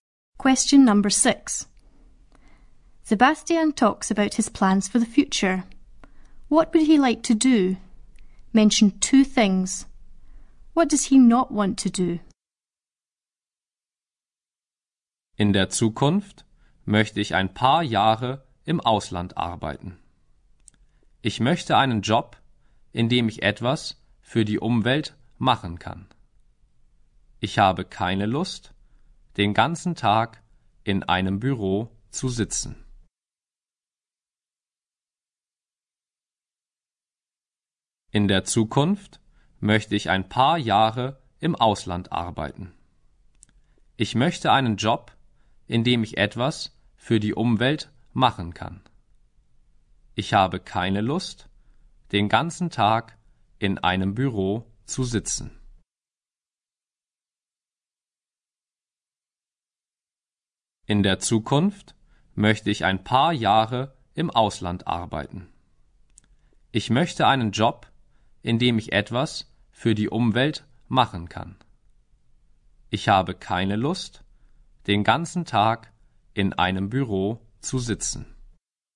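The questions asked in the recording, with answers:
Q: What would he like to do?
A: Work abroad for a few years; have a job where he can do something for the environment

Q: What does he not want to do?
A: Sit in an office all day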